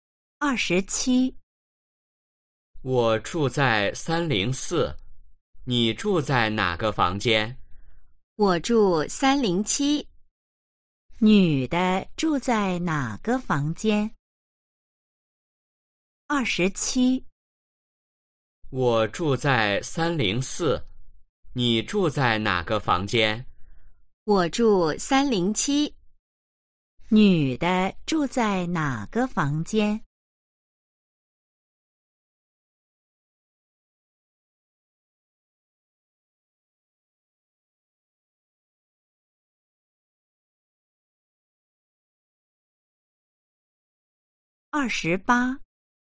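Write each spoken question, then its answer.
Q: 女的住在哪个房间?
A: 307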